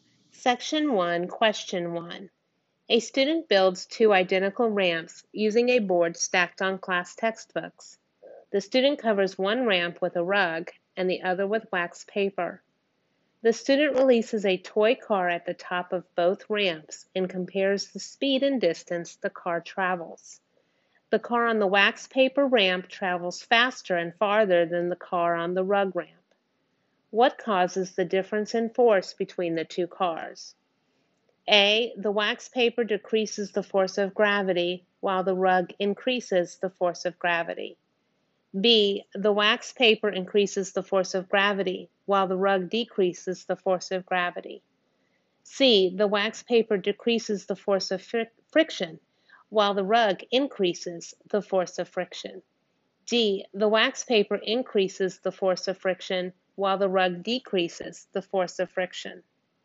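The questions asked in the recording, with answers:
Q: What causes the difference in force between the two cars?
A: C: The wax paper decreases the force of friction while the rug increases the force of friction.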